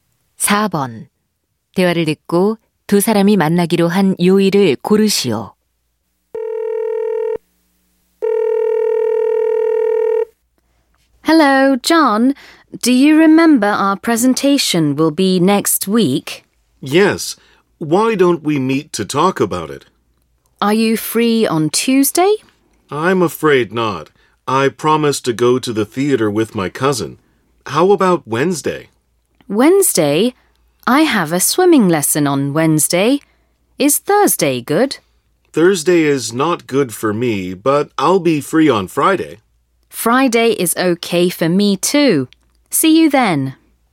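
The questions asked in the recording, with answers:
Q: 대화를 듣고 두 사람이 만나기로 한 요일을 고르시오.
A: 금요일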